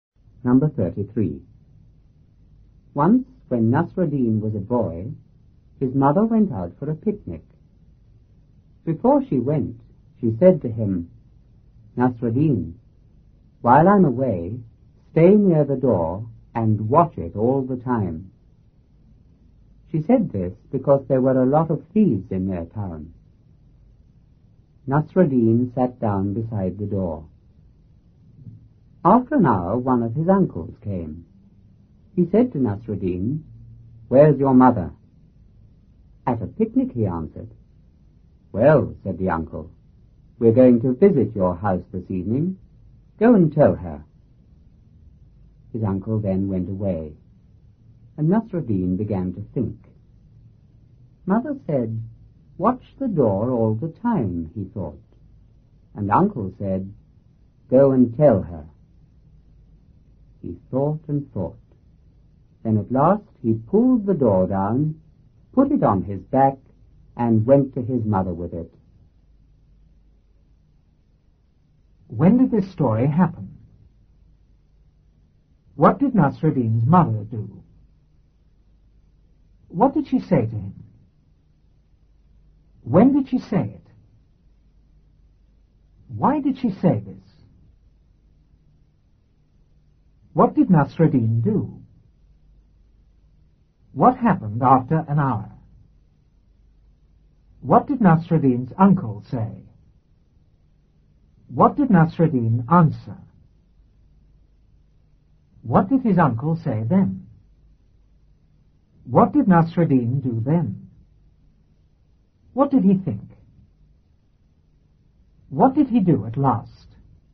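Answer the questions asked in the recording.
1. When Nasruddin was a boy
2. She went out for a picnic
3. Stay near the door and watch it all the time
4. Before she went
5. Because there were a lot of thieves in their town
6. He sat down beside the door
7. One of his uncles came
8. Where's your mother?
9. At a picnic
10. We're going to visit your house this evening. Go and tell her.
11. He began to think
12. Mother said watch the door all the time, and uncle said go and tell her
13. He pulled the door down, put it on his back and took it to his mother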